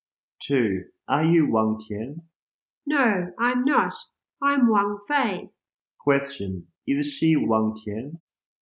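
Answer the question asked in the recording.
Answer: No, she isn't. She's Wang Fei.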